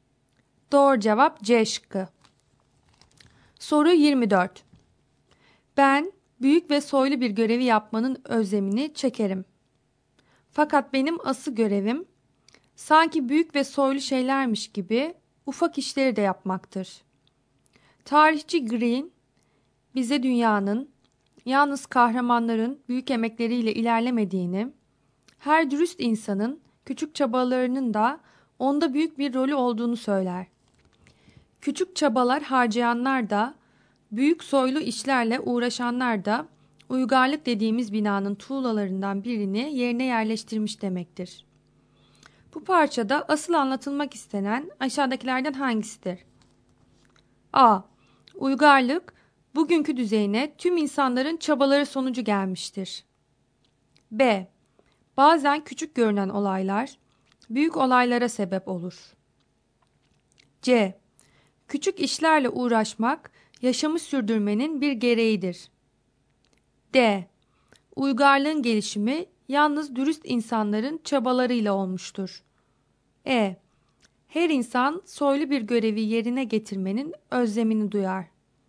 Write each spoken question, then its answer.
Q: Bu parçada asıl anlatılmak istenen aşağıdakilerden hangisidir?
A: Doğru cevap A şıkkı.